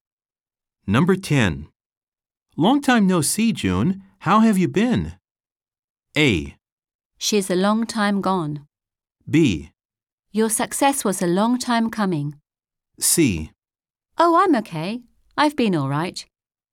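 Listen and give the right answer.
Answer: C: Oh, I'm okay. I've been all right.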